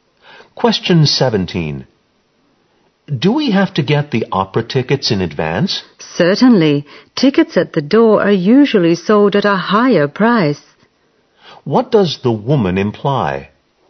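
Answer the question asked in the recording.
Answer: They should get the tickets in advance, because tickets at the door usually cost more.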